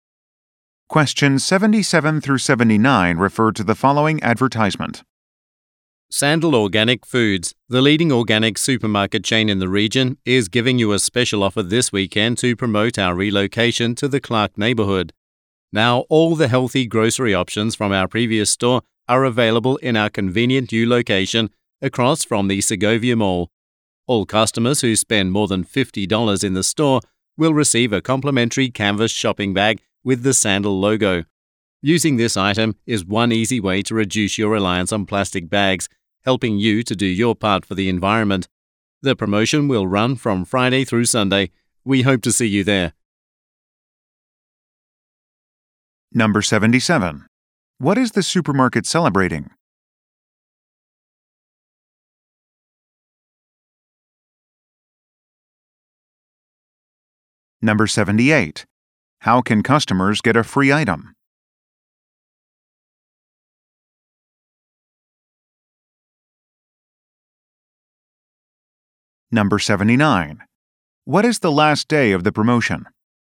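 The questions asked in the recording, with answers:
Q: What is the supermarket celebrating?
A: Its relocation

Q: How can customers get a free item?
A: Spend more than $50

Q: What is the last day of the promotion?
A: Sunday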